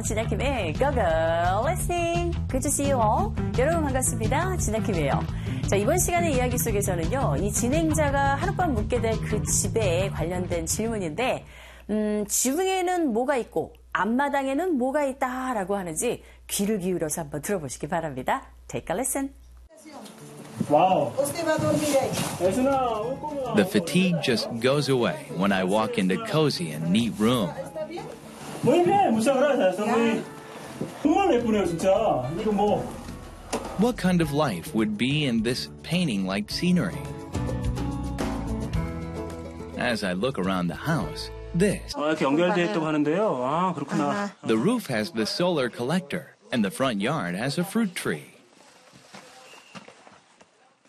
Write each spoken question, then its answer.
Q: 이 진행자가 하룻밤 묵게 될 그 집에 관련된 질문인데, 지붕에는 뭐가 있고 앞마당에는 뭐가 있다라고 하는지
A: 지붕에는 태양열 지벽이가 있고 앞마당에는 과일나무 하나가 있다.